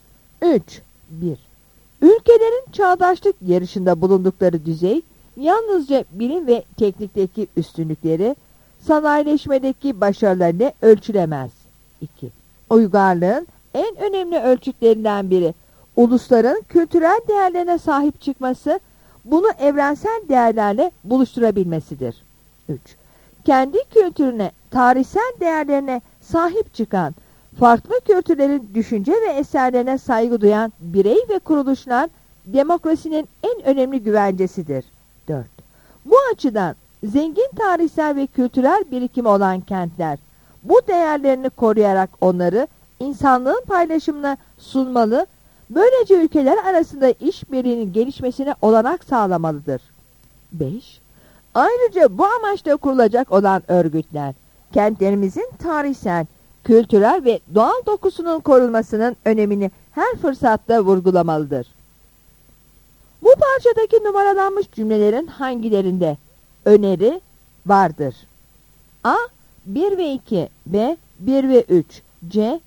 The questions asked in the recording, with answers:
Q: Bu parçadaki numaralanmış cümlelerin hangilerinde öneri vardır?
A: Yanıt E'dir.